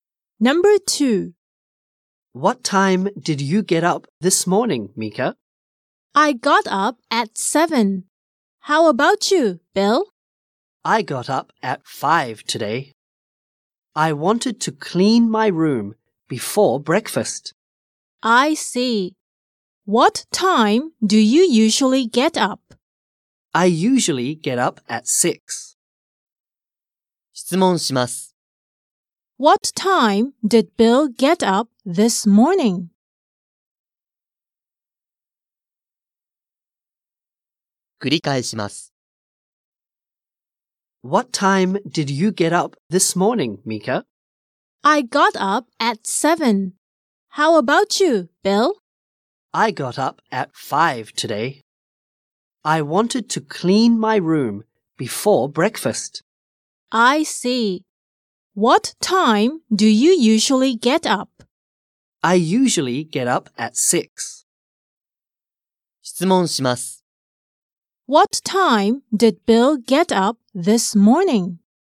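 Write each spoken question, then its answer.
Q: What time did Bill get up this morning?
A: At 5.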